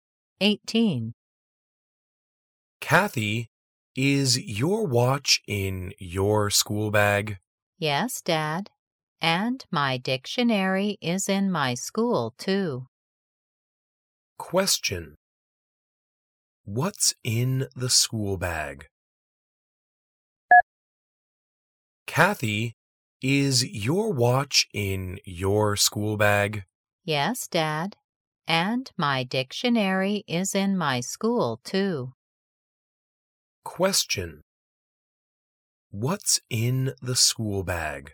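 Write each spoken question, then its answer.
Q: What's in the school bag?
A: Kathy's watch and dictionary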